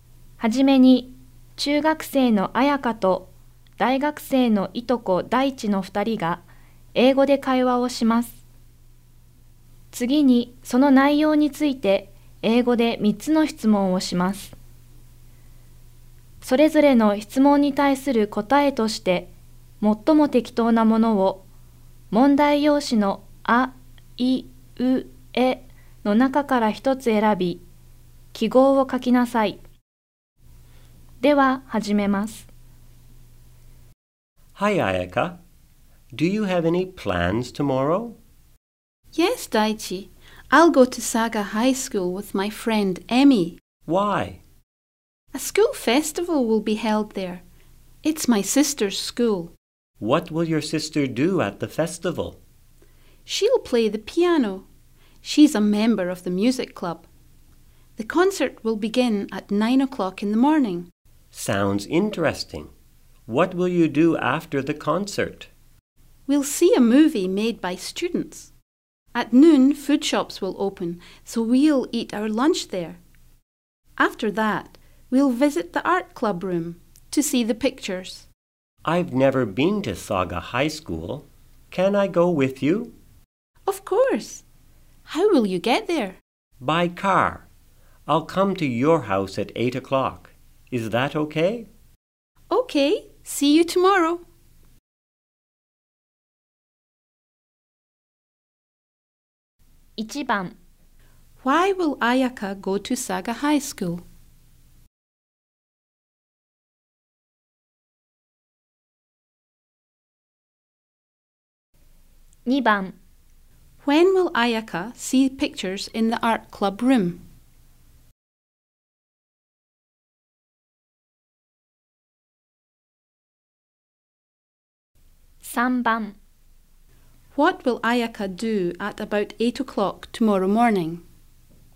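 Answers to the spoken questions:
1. To go to the school festival (her sister's school)
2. After lunch (in the afternoon)
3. Wait at home for Daichi to pick her up by car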